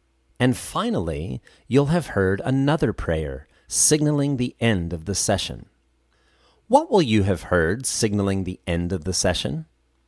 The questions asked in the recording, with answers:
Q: What will you have heard signaling the end of the session?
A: I will have heard a prayer signaling the end of the session.